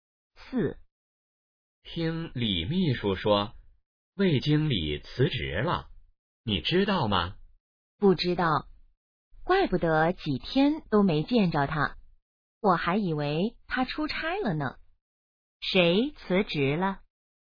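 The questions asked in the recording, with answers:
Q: 谁辞职了?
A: 魏经理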